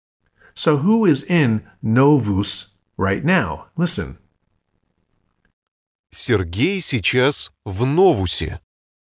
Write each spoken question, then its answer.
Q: So who is in Novus right now?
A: So Сергей is in Новусе.